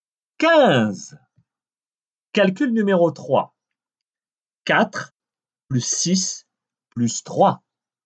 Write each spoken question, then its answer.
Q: 4 plus 6 plus 3.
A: Treize.